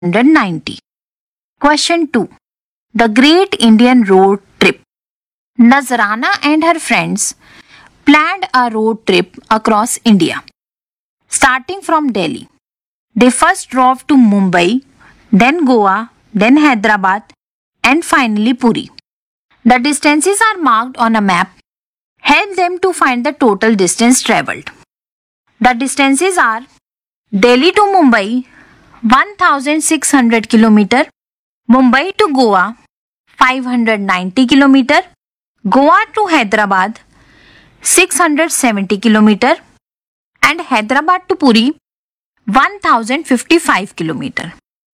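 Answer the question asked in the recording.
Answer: 3915 km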